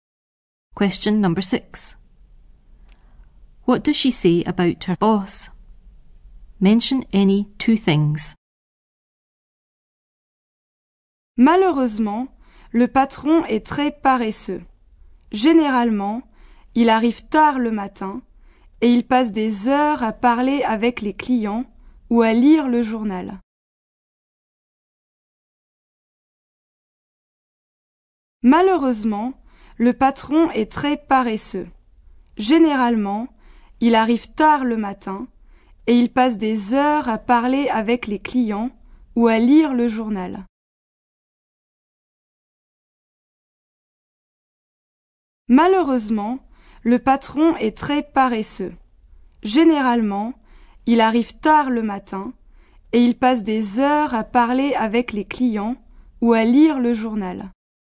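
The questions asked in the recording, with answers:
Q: What does she say about her boss?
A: Very lazy; arrives late; spends hours talking to customers or reading the paper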